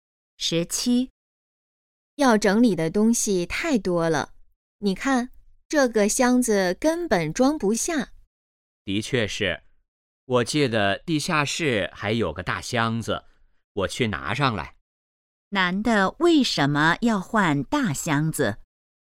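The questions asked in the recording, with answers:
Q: 男的为什么要换大箱子?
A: 东西太多,箱子装不下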